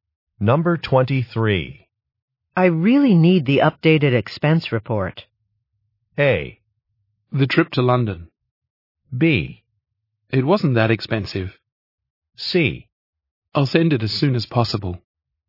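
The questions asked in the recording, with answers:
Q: I really need the updated expense report.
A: C: I'll send it as soon as possible.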